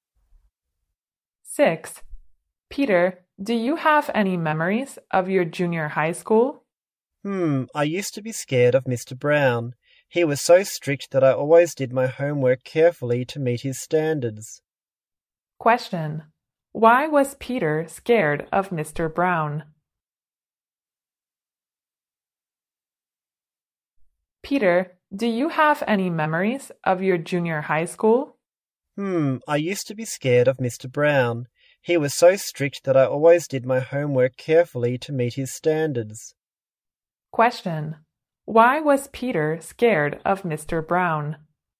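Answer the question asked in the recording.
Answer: Because Mr. Brown was very strict.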